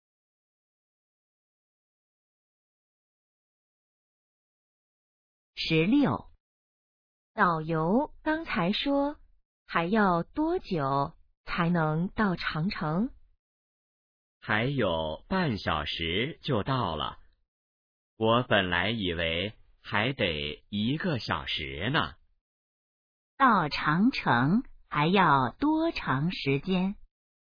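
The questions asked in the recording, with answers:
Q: 到长城还要多长时间?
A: 半小时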